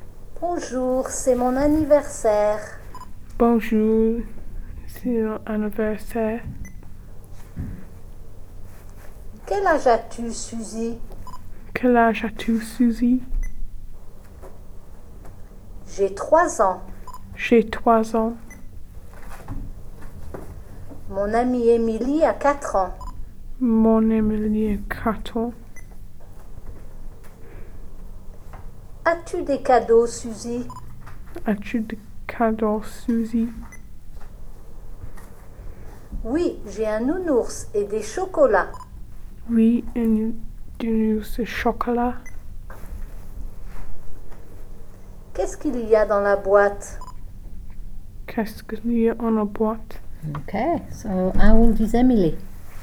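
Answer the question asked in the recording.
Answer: Four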